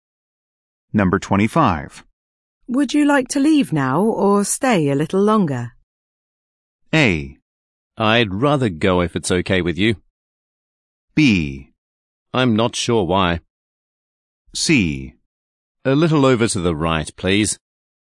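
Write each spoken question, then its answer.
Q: Would you like to leave now or stay a little longer?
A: A: I'd rather go if it's okay with you.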